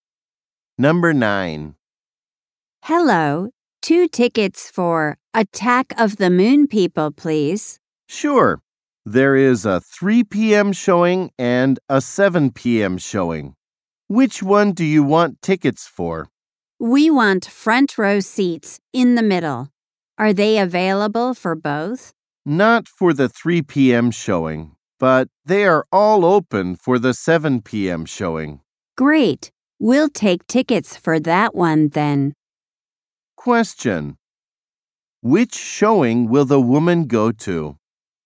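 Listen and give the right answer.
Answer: The 7 p.m. showing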